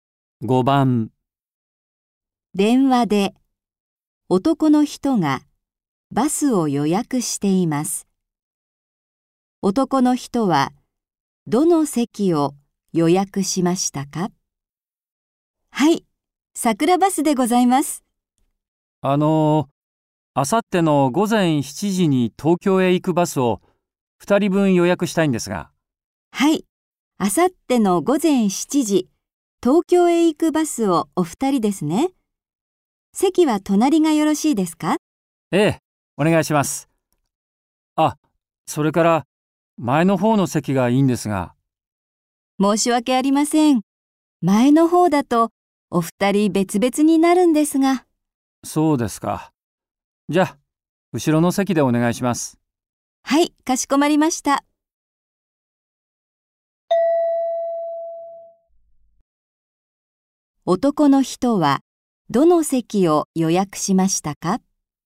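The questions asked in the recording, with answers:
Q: 男の人はどの席を予約しましたか?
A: 後ろの方の隣同士の席(2人分)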